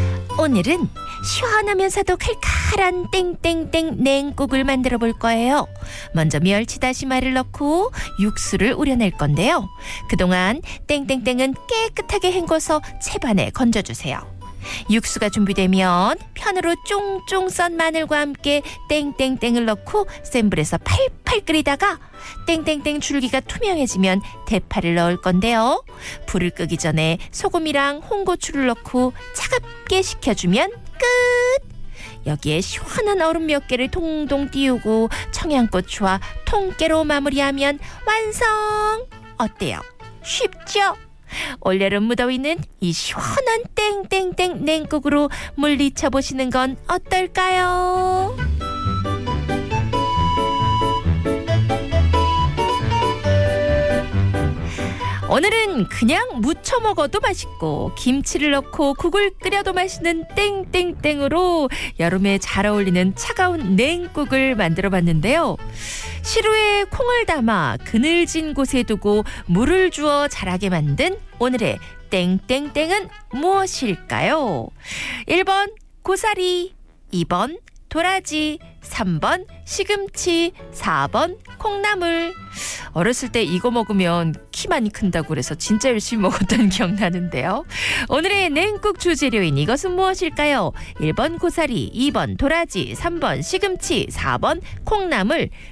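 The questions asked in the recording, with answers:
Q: 오늘의 냉국 주재료인 이것은 무엇일까요? 1번 고사리, 2번 도라지, 3번 시금치, 4번 콩나물.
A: 4번: 콩나물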